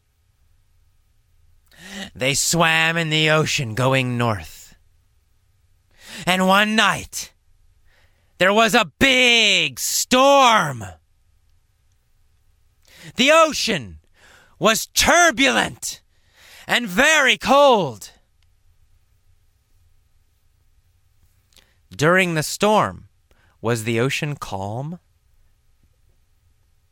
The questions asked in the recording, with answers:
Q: During the storm, was the ocean calm?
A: No, it wasn't calm. It was turbulent.